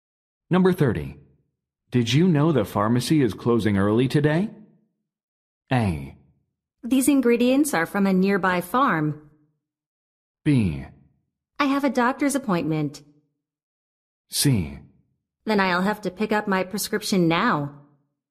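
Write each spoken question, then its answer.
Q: Did you know the pharmacy is closing early today?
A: C: Then I'll have to pick up my prescription now.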